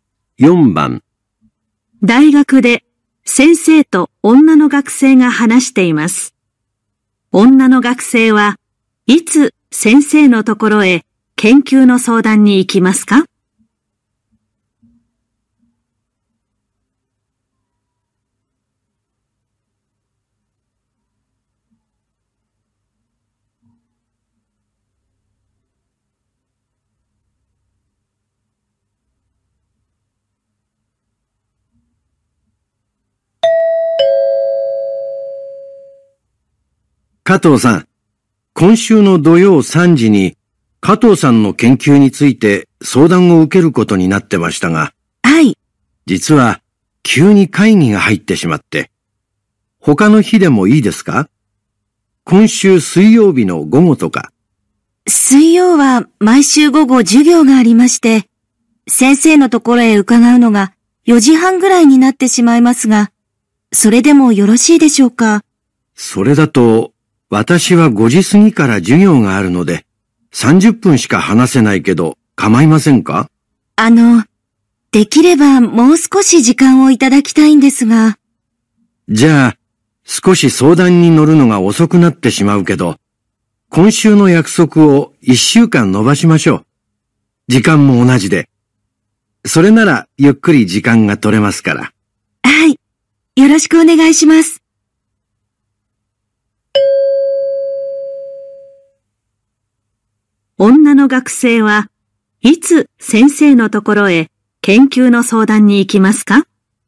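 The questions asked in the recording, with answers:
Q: 女の学生はいつ先生のところへ研究の相談に行きますか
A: 来週の土曜日3時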